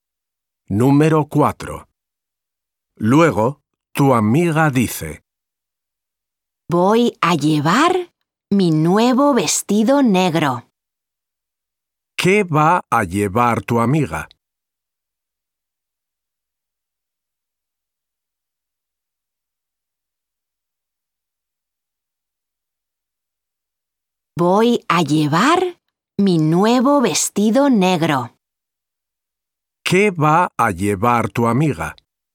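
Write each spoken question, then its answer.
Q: ¿Qué va a llevar tu amiga?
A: Su nuevo vestido negro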